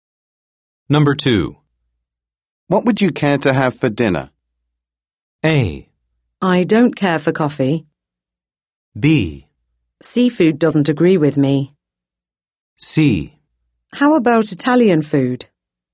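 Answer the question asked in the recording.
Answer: C: How about Italian food?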